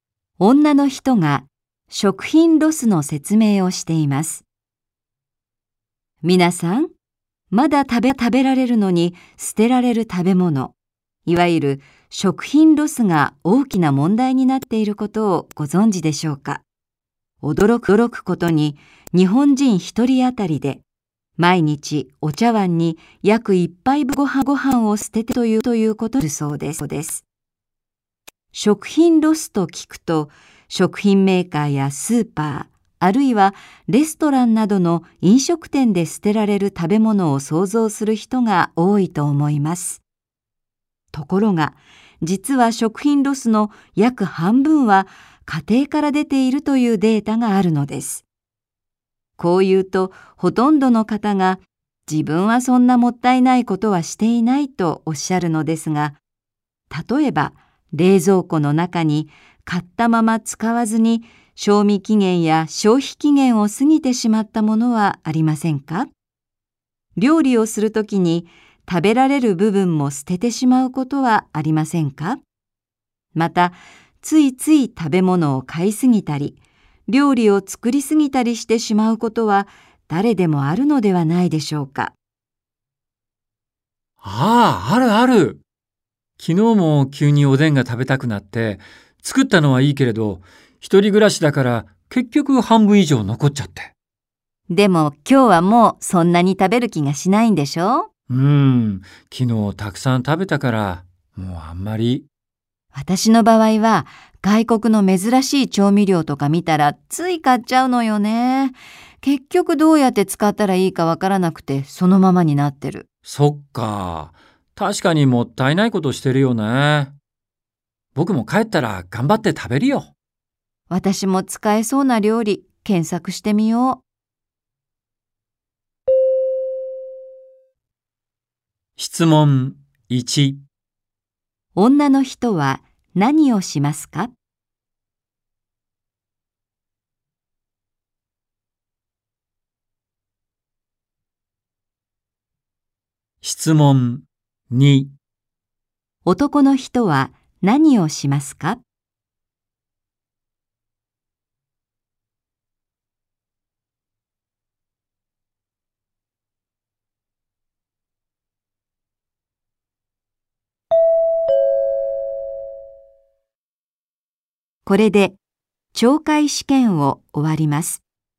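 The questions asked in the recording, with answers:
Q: 女の人は何をしますか?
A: 買った外国の調味料を使える料理を検索する

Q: 男の人は何をしますか?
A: 作りすぎて残ったおでんを食べる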